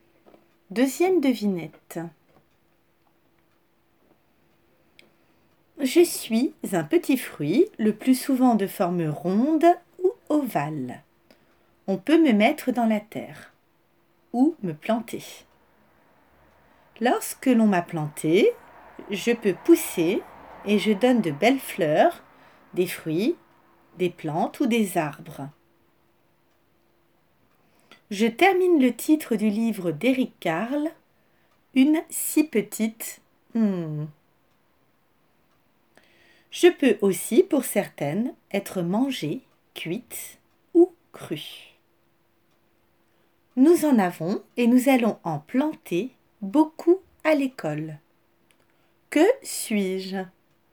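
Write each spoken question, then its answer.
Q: Que suis-je?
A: une graine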